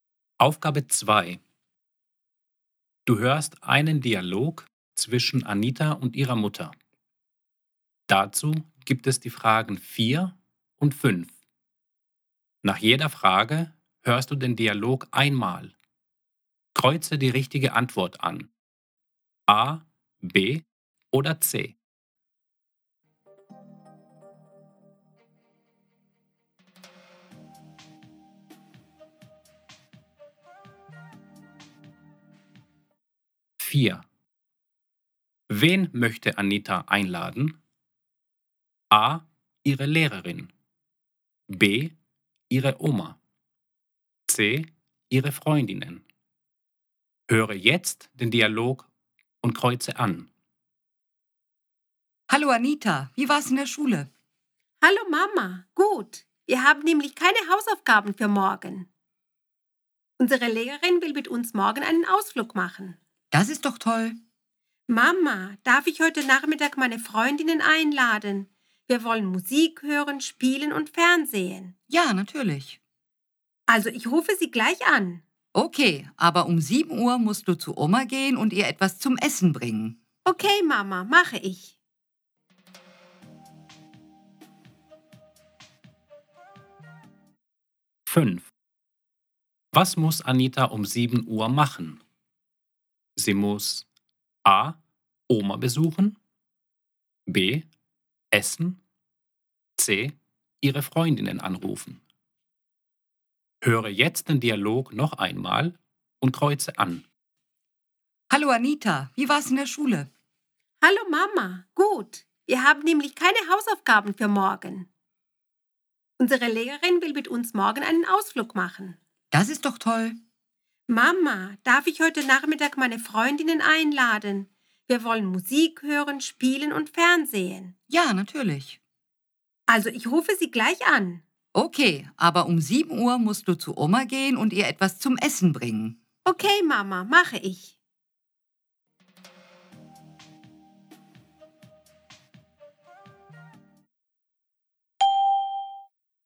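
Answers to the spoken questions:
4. C: ihre Freundinnen
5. A: Oma besuchen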